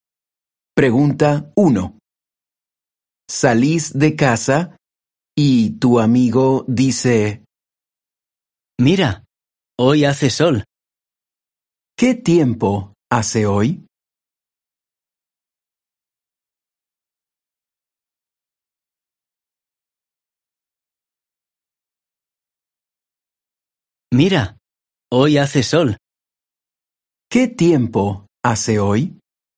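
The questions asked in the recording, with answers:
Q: ¿Qué tiempo hace hoy?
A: Hace sol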